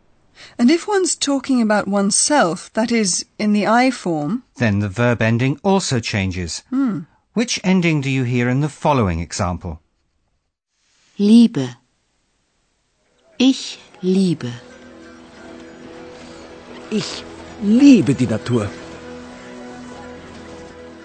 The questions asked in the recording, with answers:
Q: Which ending do you hear in the following example?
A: When ich, that is I, is used, the ending has to be e.